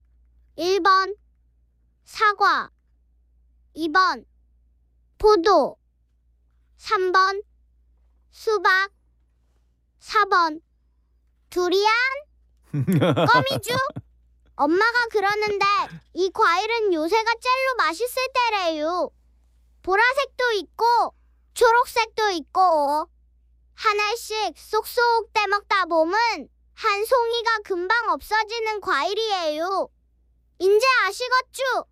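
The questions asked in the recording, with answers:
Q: 이제 아시겠죠?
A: 2: 포도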